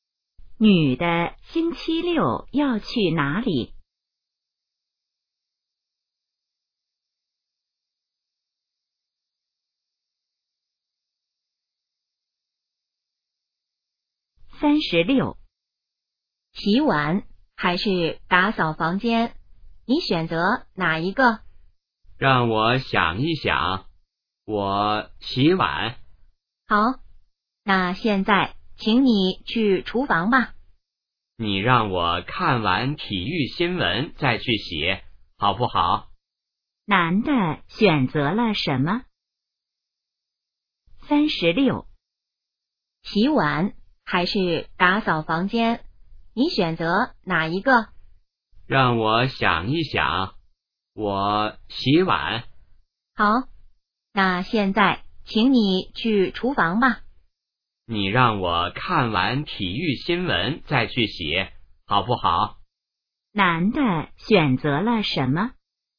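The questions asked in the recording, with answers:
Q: 男的选择了什么?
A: 洗碗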